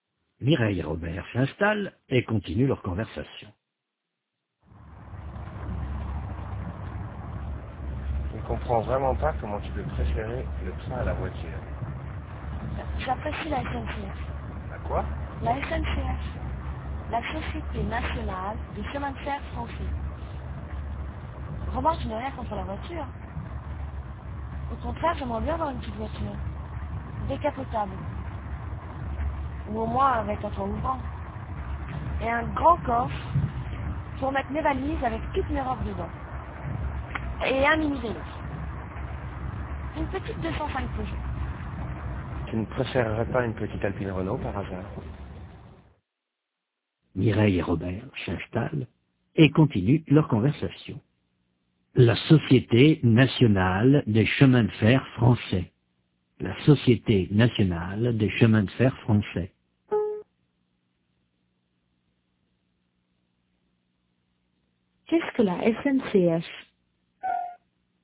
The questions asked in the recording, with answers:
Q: Qu'est-ce que la SNCF?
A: La Société Nationale des Chemins de Fer Français.